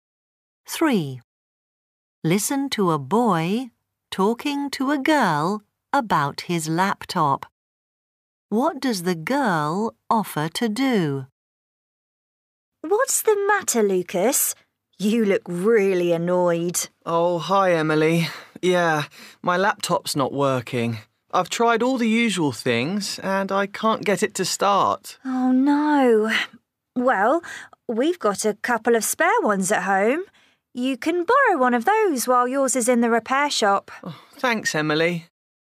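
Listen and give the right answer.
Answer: Lend him one of her spare laptops.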